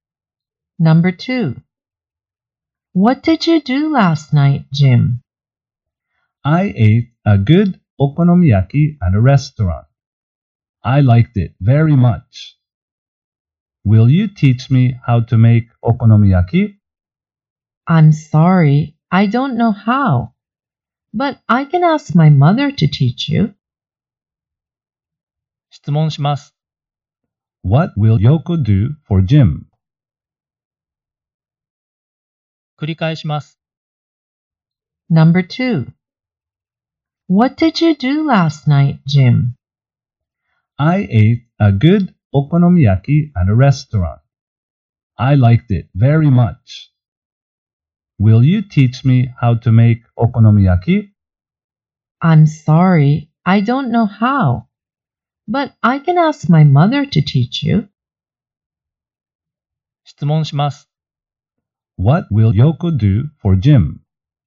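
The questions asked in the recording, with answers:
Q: What will Yoko do for Jim?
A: She will ask her mother to teach him how to make okonomiyaki.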